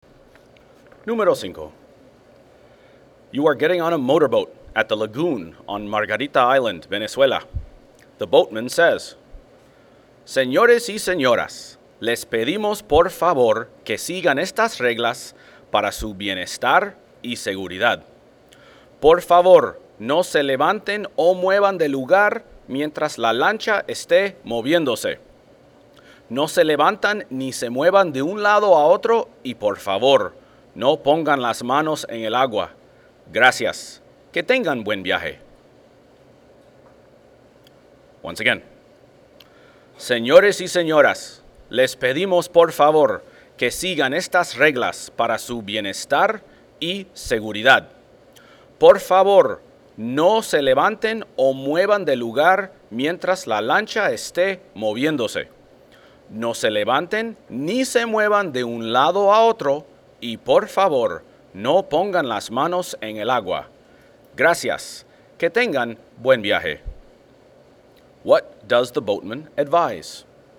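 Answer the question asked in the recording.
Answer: Stay seated and don't move around while the boat is moving, and keep your hands out of the water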